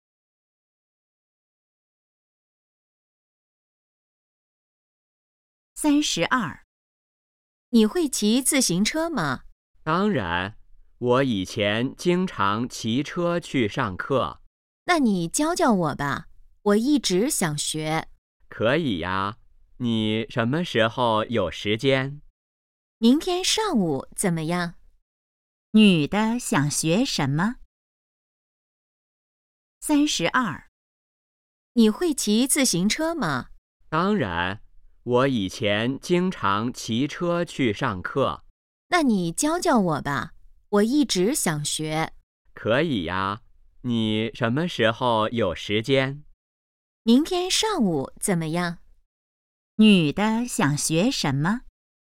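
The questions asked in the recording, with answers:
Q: 女的想学什么?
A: 骑自行车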